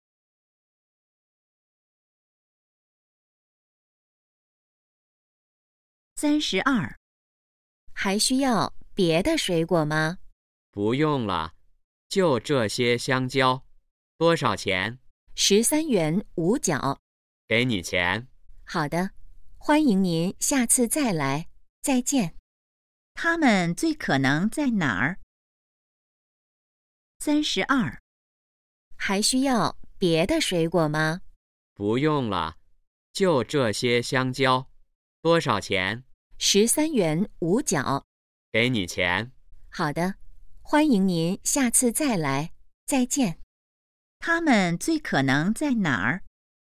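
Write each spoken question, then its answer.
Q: 他们最可能在哪儿?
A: 水果店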